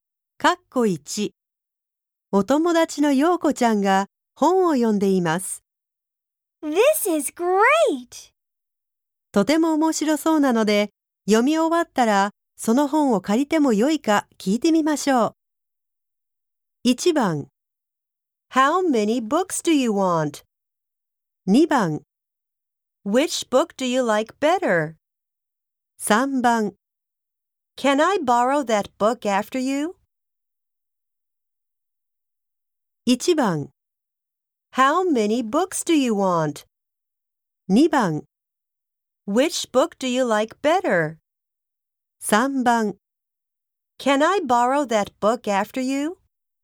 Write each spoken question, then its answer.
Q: とても面白そうなので、読み終わったらその本を借りてもよいか聞いてみましょう。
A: 答えは3番の Can I borrow that book after you?